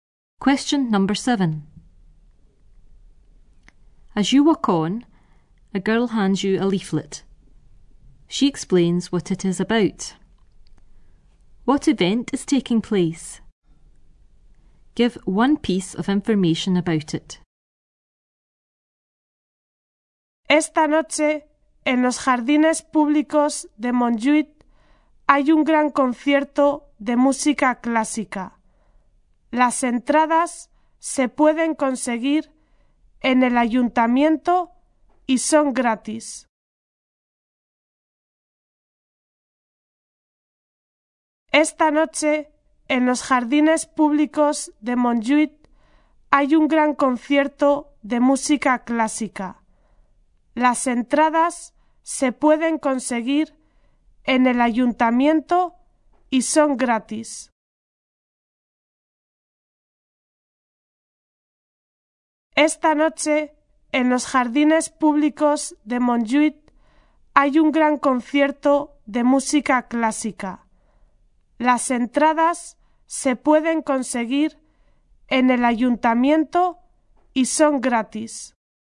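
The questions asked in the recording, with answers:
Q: What event is taking place?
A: A big classical music concert

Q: Give one piece of information about it.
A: Tonight, in the Montjuïc public gardens; tickets free from the town hall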